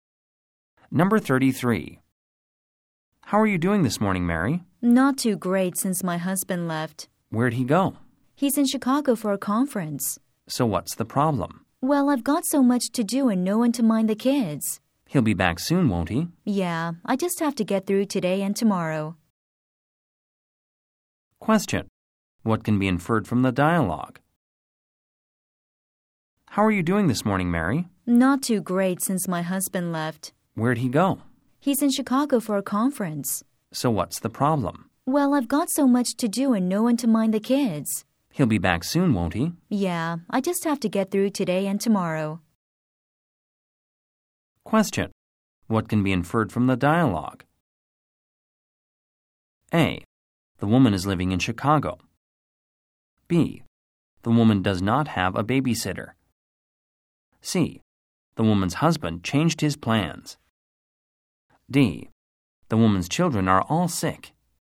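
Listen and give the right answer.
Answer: B: The woman does not have a babysitter.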